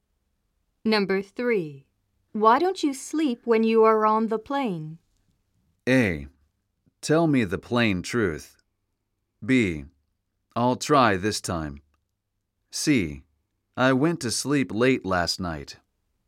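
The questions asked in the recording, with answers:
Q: Why don't you sleep when you are on the plane?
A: B: I'll try this time.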